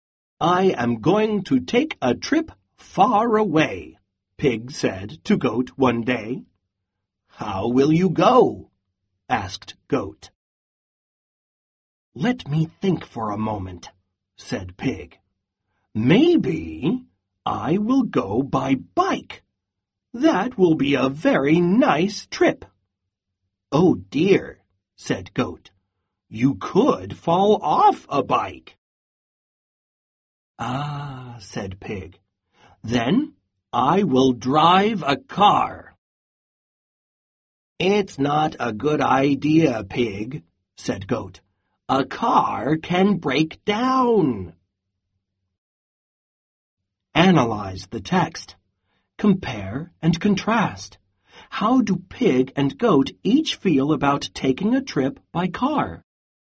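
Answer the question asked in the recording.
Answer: Pig thinks driving a car is a good idea; Goat thinks it is not a good idea because a car can break down.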